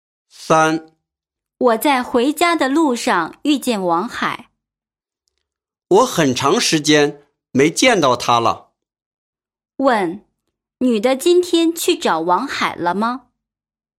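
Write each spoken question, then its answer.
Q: 女的今天去找王海了吗?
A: 没有,是在回家路上偶然遇见的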